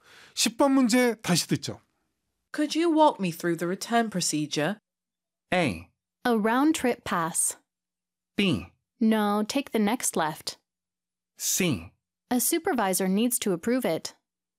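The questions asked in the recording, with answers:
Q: Could you walk me through the return procedure?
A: C: A supervisor needs to approve it.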